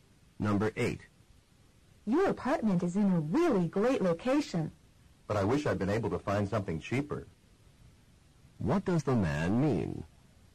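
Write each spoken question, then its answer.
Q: What does the man mean?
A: His apartment is expensive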